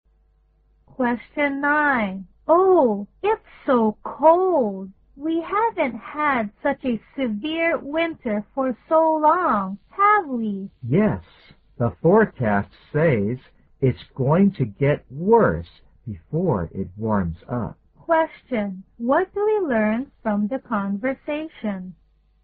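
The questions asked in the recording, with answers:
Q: What do we learn from the conversation?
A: This winter is unusually cold, and it will get colder before it warms up.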